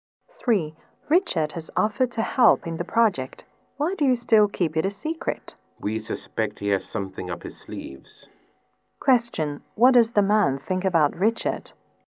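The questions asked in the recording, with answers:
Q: What does the man think about Richard?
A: Richard may have a hidden motive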